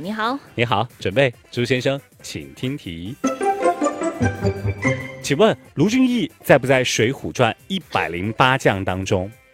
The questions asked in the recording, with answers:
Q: 请问卢俊义在不在《水浒传》108将当中?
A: 在,没错。